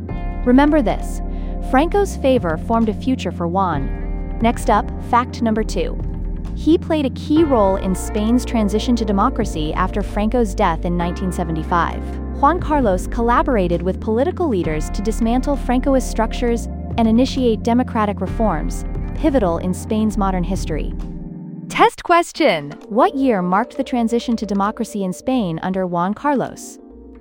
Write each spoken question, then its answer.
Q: What year marked the transition to democracy in Spain under Juan Carlos?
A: 1975.